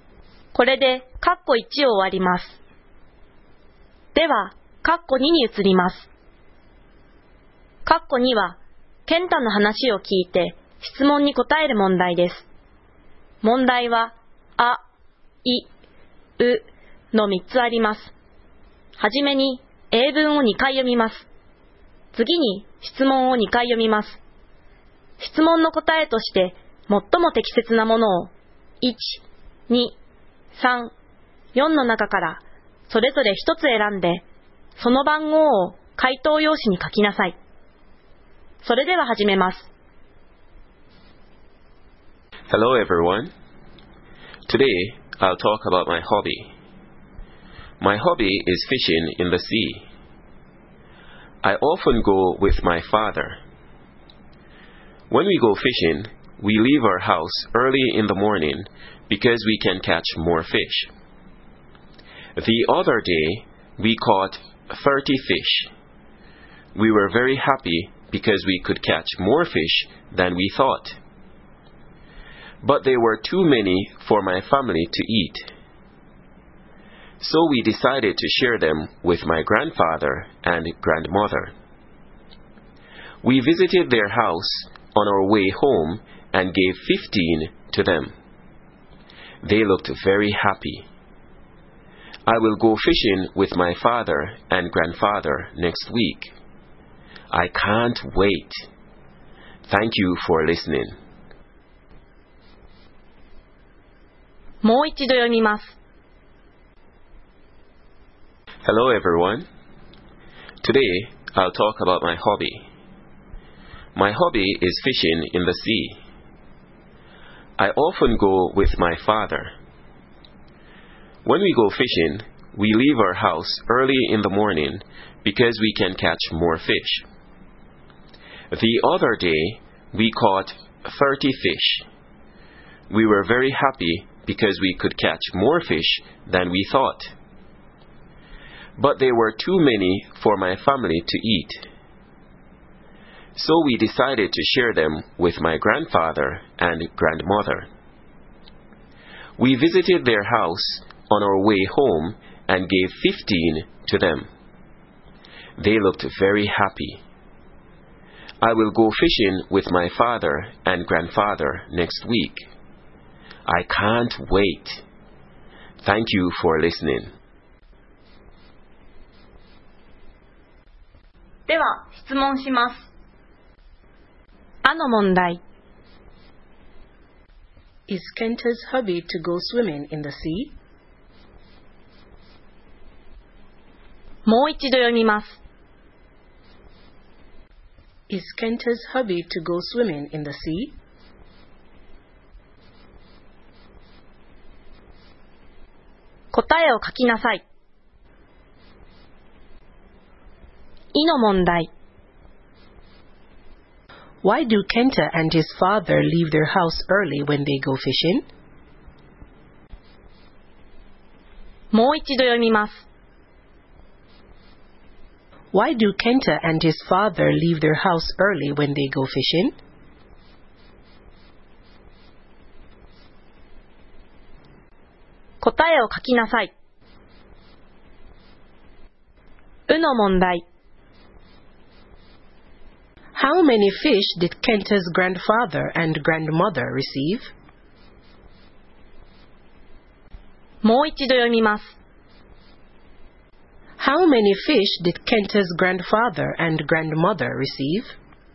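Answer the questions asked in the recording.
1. No, it isn't. His hobby is fishing in the sea.
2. Because they can catch more fish.
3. 15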